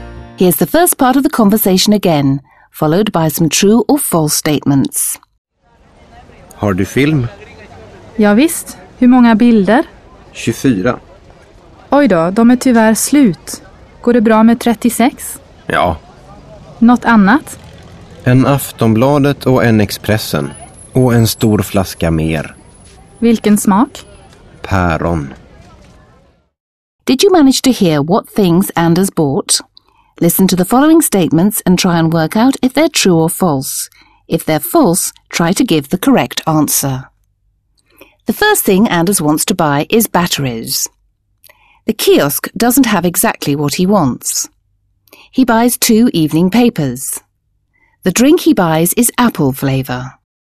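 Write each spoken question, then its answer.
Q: The first thing Anders wants to buy is batteries.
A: False: he wants film

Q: The kiosk doesn't have exactly what he wants.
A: True

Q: He buys two evening papers.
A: True

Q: The drink he buys is apple flavour.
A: False: it is pear flavour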